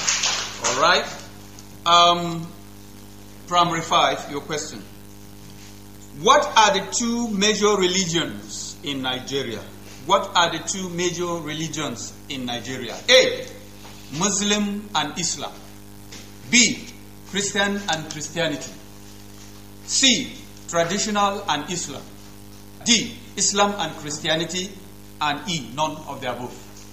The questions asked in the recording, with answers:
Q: What are the two major religions in Nigeria?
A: The answer is D, which is Islam and Christianity.